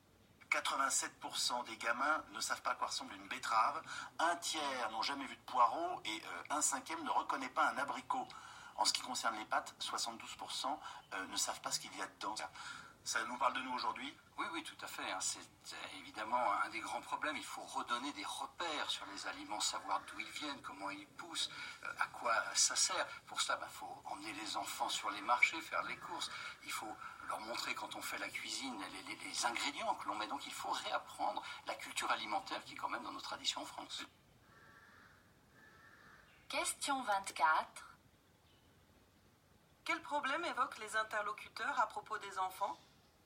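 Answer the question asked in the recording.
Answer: Ils ne connaissent pas les aliments (ne savent pas à quoi ils ressemblent, d'où ils viennent ni ce qu'ils contiennent).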